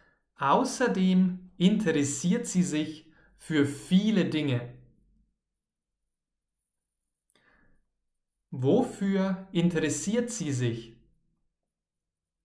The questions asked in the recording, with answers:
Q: Wofür interessiert sie sich?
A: Für viele Dinge. Martha interessiert sich für viele Dinge.